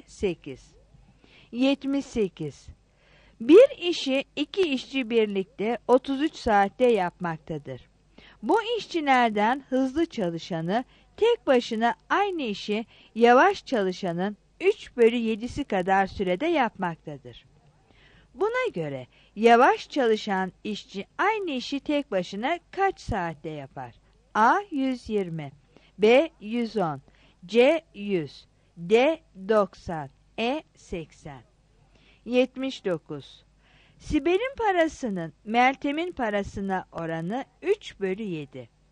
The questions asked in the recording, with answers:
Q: Buna göre yavaş çalışan işçi aynı işi tek başına kaç saatte yapar?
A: 78 B